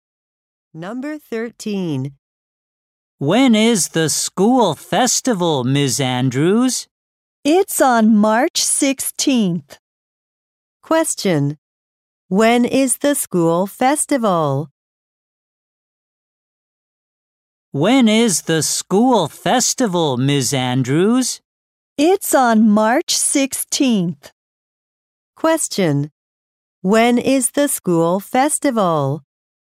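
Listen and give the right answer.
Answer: On March 16th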